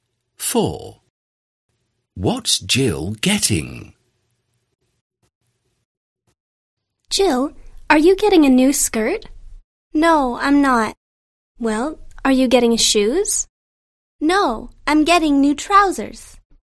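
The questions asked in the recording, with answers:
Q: What's Jill getting?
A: New trousers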